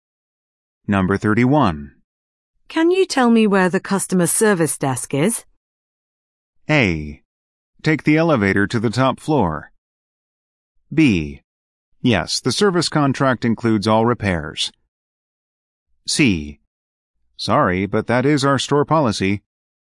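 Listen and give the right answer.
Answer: A: Take the elevator to the top floor.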